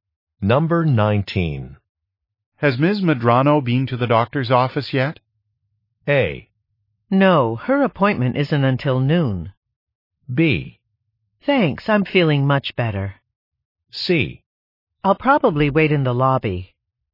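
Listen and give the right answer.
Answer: A: No, her appointment isn't until noon.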